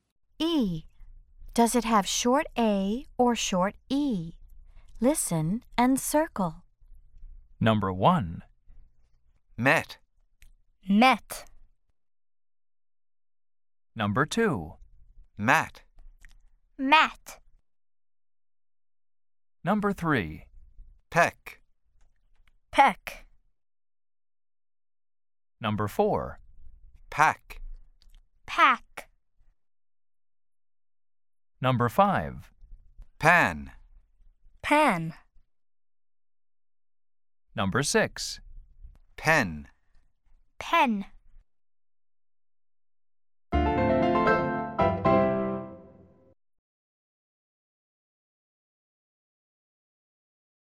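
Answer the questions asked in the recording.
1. short E (met)
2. short A (mat)
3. short E (peck)
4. short A (pack)
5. short A (pan)
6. short E (pen)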